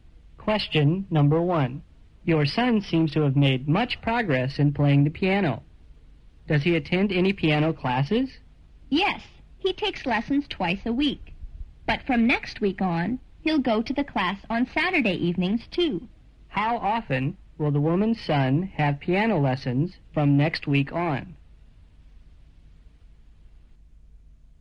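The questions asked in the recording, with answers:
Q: How often will the woman's son have piano lessons from next week on?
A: Three times a week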